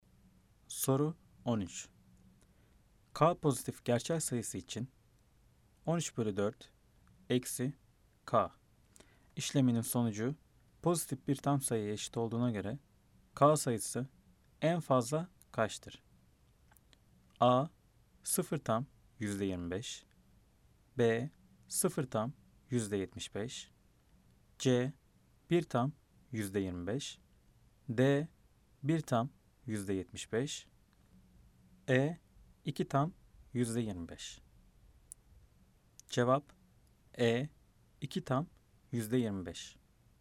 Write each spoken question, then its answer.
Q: K pozitif gerçel sayısı için 13 bölü 4 eksi K işleminin sonucu pozitif bir tam sayıya eşit olduğuna göre K sayısı en fazla kaçtır?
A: Cevap E. 2 tam %25.